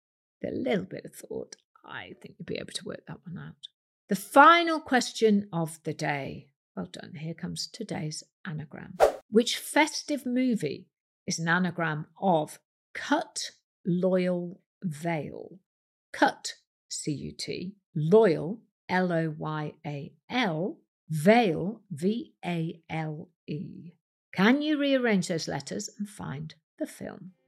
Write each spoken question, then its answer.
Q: Which festive movie is an anagram of cut, loyal, veil?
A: The answer is Love, actually.